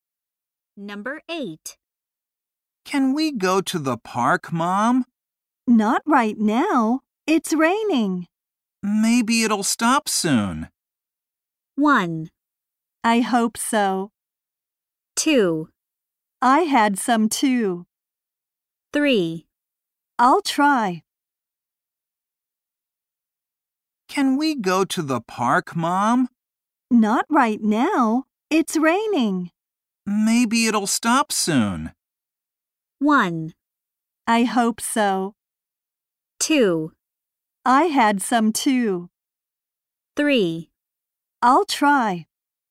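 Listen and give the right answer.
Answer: 1: I hope so.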